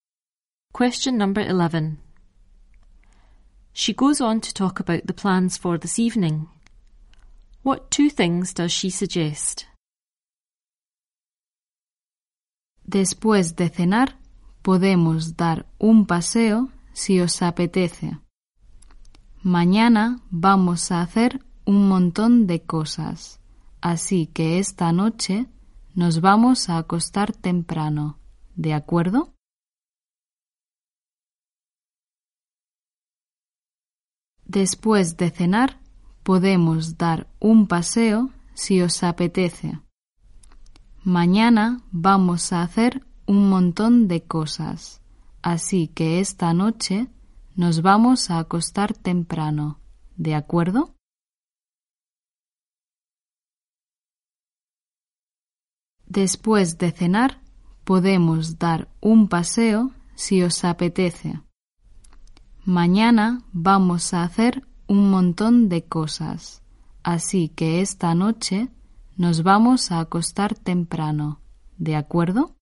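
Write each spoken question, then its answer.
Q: What two things does she suggest?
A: Go for a walk after dinner; go to bed early tonight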